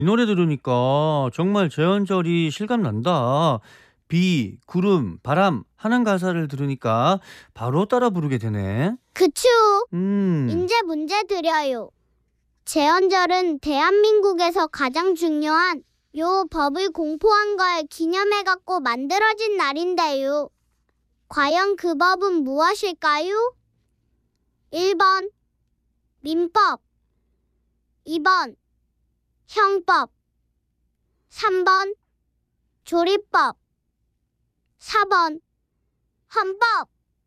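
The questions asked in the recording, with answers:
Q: 과연 그 법은 무엇일까요?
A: 4: 헌법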